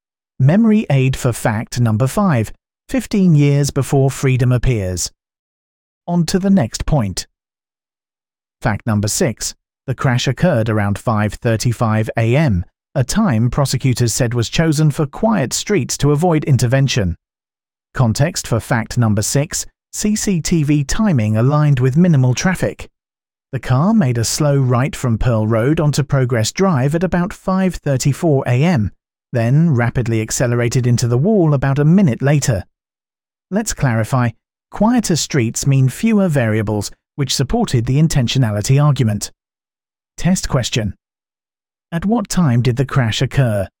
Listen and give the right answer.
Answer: Correct answer, 5:35 a.m.